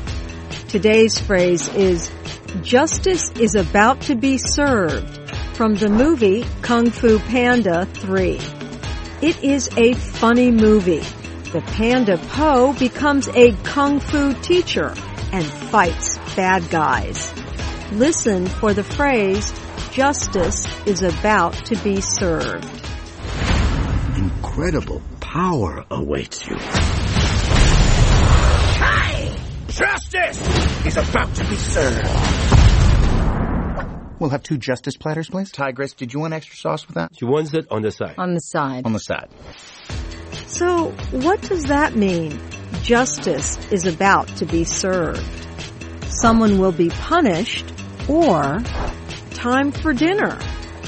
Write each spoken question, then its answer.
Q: So, what does that mean? Justice is about to be served.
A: Justice is about to be served means someone will be punished.